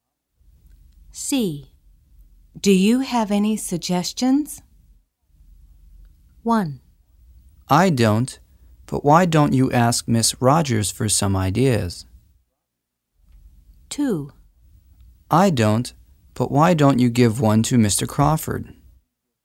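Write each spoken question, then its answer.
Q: Do you have any suggestions?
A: 1: I don't, but why don't you ask Miss Rogers for some ideas?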